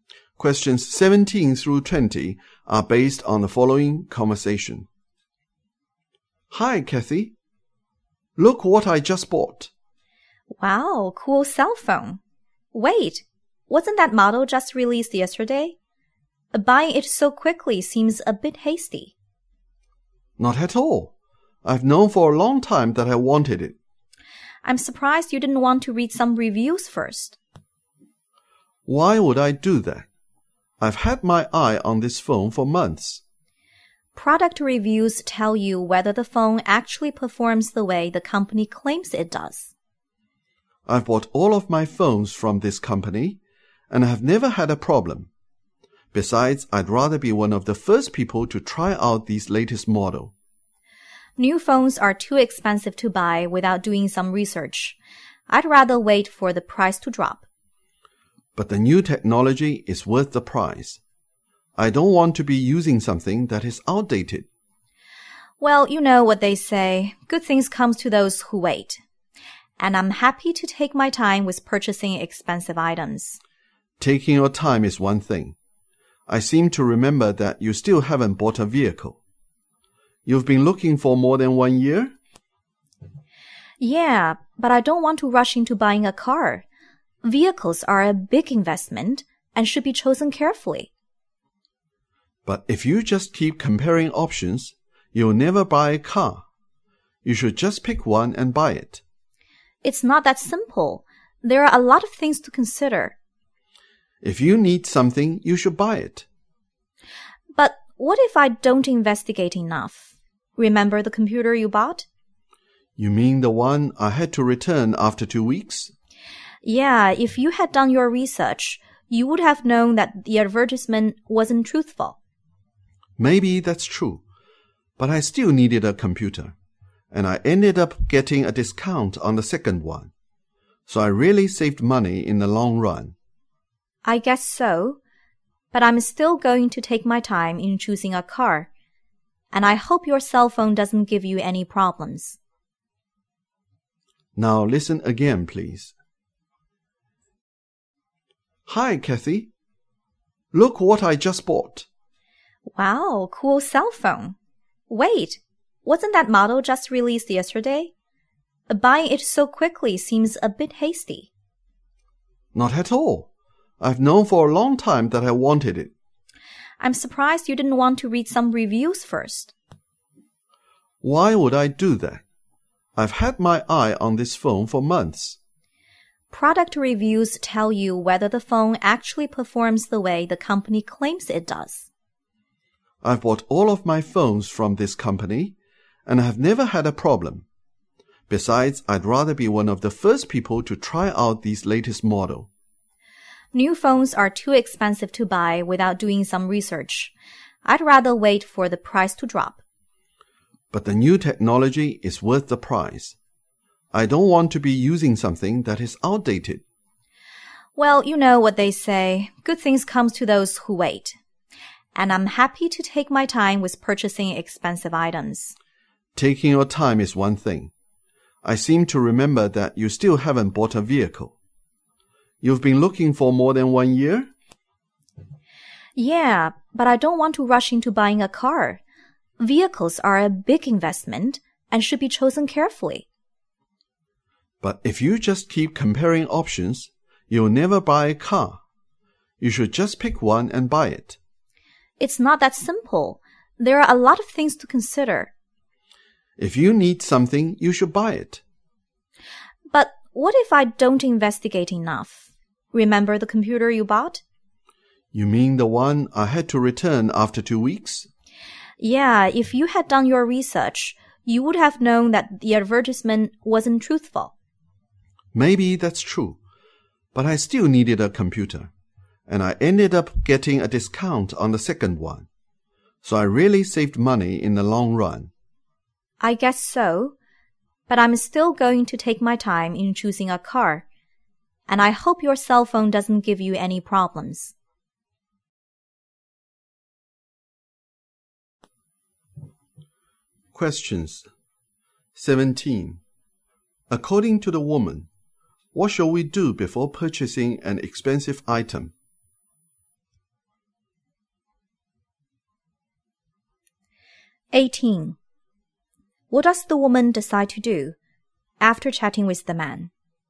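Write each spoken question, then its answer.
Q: According to the woman, what shall we do before purchasing an expensive item?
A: Do research, such as reading reviews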